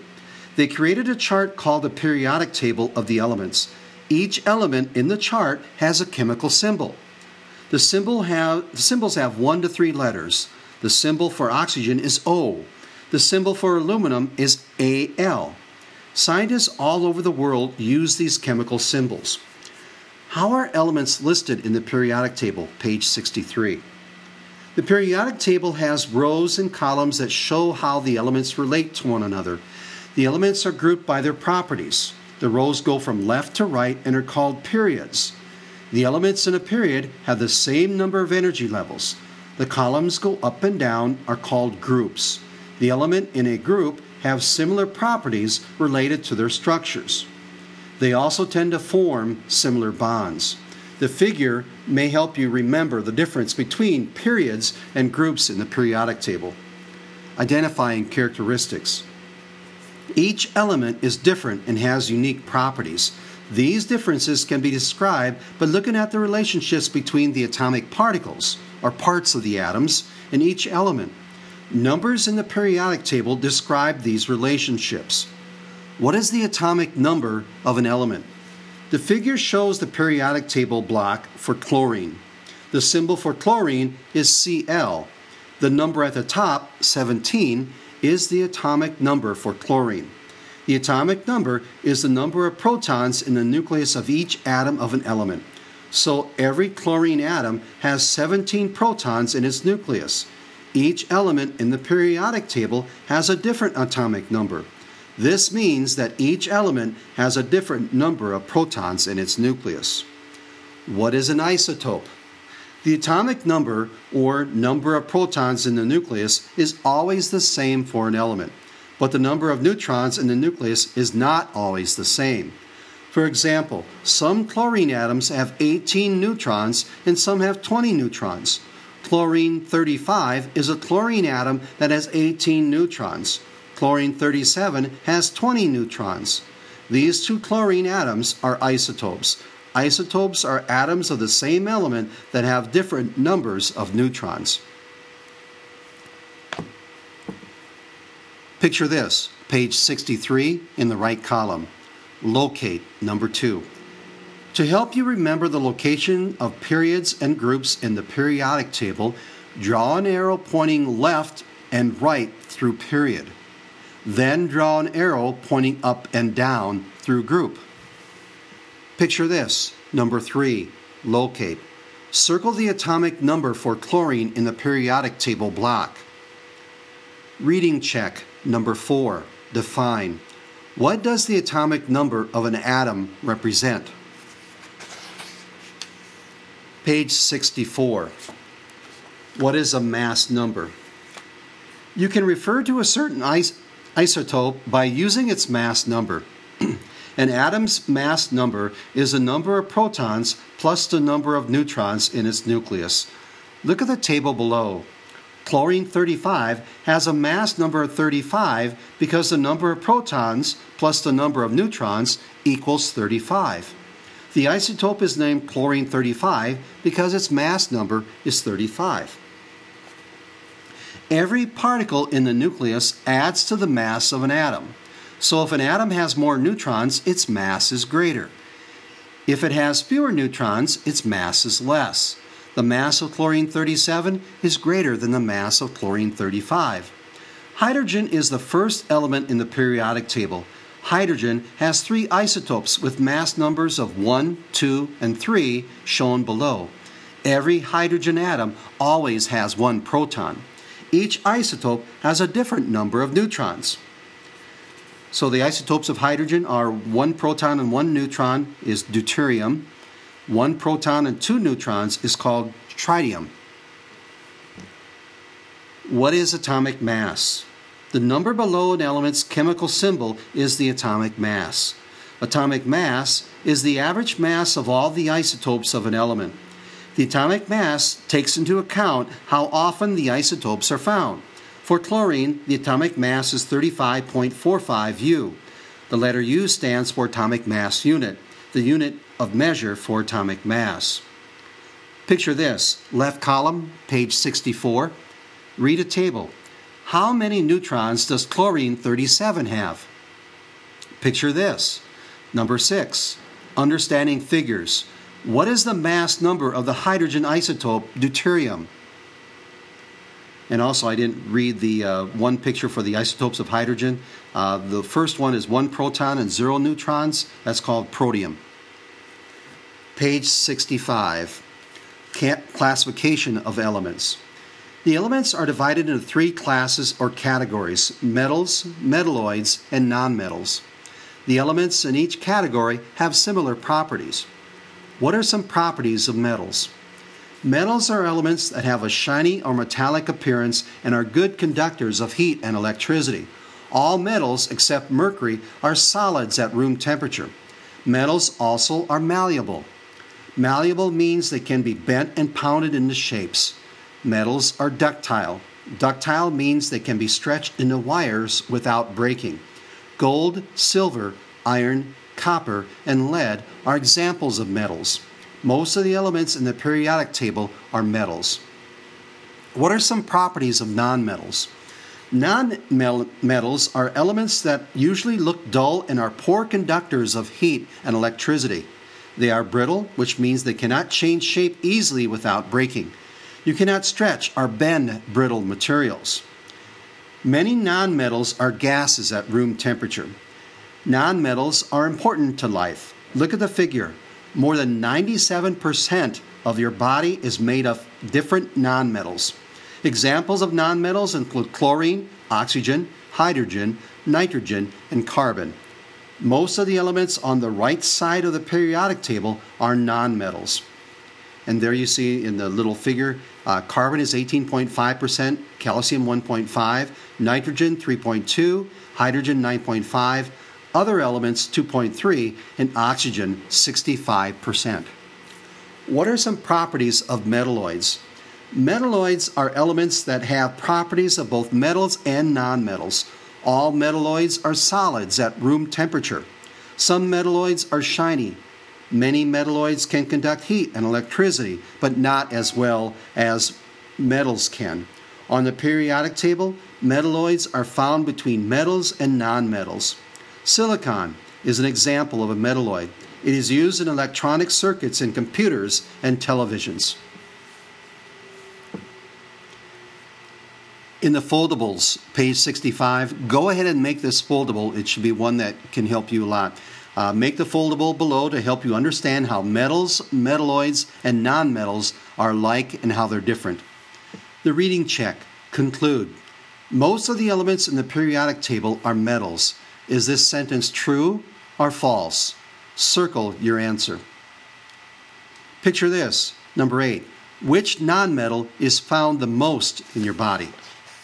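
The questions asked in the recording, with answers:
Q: What does the atomic number of an atom represent?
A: The number of protons in the nucleus of each atom of the element

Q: How many neutrons does chlorine 37 have?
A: 20

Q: Most of the elements in the periodic table are metals. Is this sentence true or false?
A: True

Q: Which nonmetal is found the most in your body?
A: Oxygen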